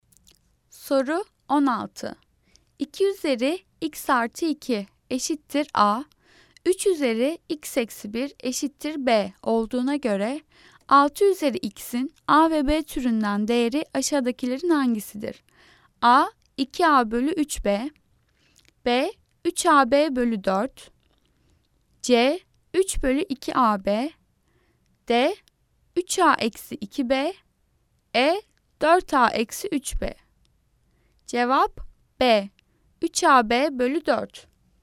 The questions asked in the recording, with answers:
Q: 2 üzeri x artı 2 eşittir a, 3 üzeri x eksi 1 eşittir b olduğuna göre 6 üzeri x'in a ve b türünden değeri aşağıdakilerin hangisidir?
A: Cevap B. 3AB bölü 4.